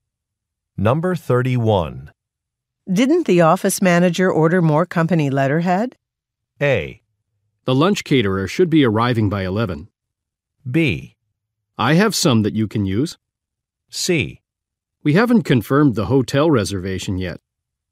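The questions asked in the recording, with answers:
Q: Didn't the office manager order more company letterhead?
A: B: I have some that you can use.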